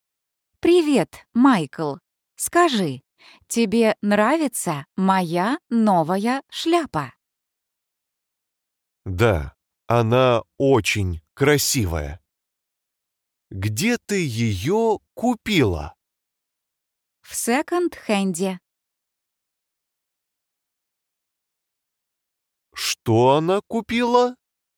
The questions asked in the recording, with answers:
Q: Что она купила?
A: Новую шляпу.